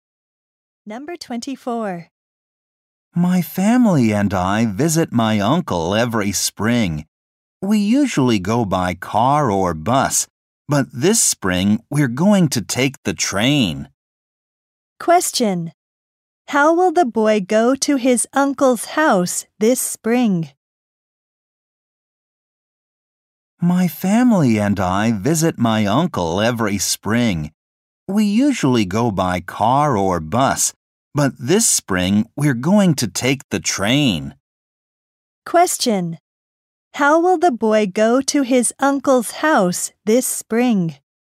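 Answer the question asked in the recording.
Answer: By train.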